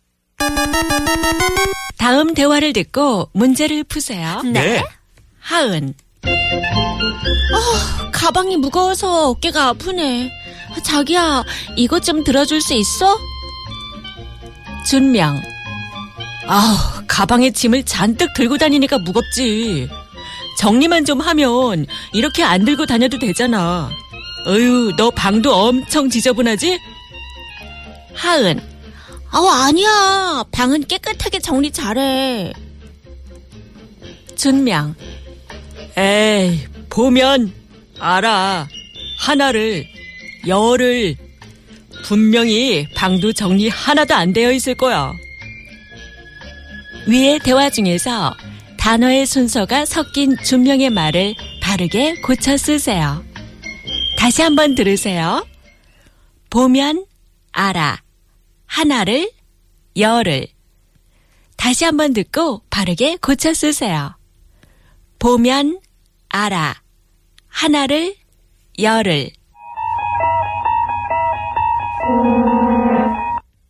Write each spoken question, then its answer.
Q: 위의 대화 중에서 단어의 순서가 섞인 준명의 말을 바르게 고쳐 쓰세요.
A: 하나를 보면, 열을 알아.